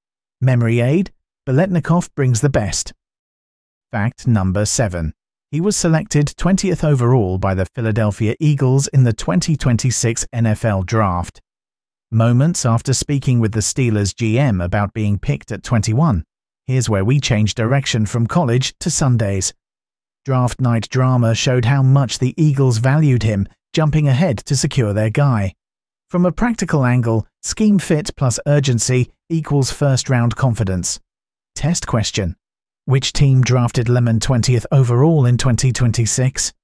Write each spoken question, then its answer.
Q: Which team drafted Lemon 20th overall in 2026?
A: Philadelphia Eagles.